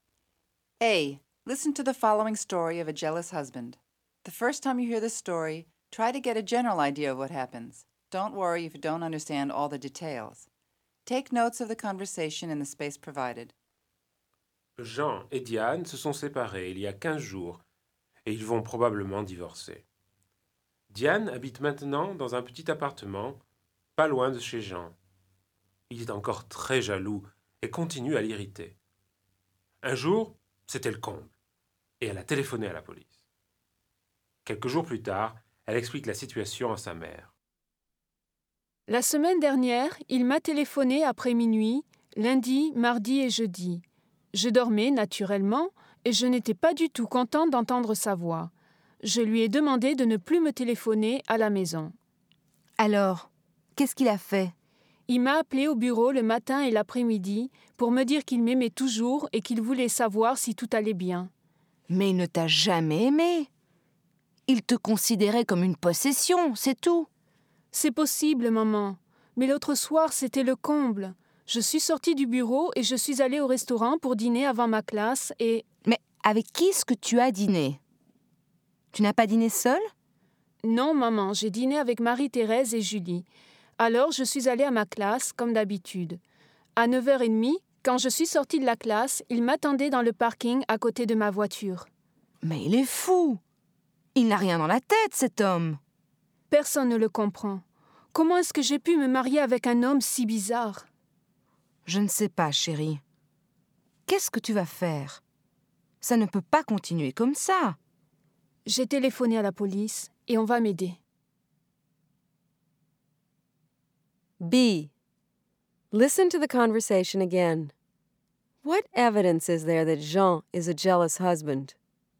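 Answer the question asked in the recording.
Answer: He phoned her after midnight several nights, called her at the office morning and afternoon, and waited for her by her car in the parking lot after her class.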